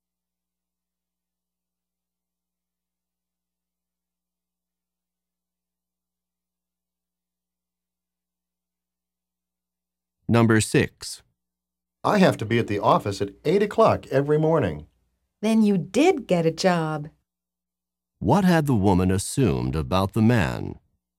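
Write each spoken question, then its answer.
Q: What had the woman assumed about the man?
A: That he did not have a job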